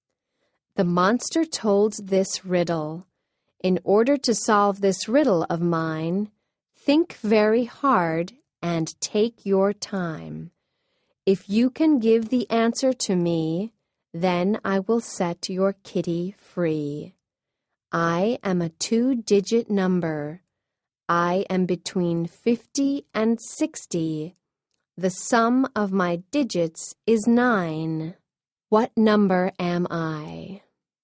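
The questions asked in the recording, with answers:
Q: What number am I?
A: 54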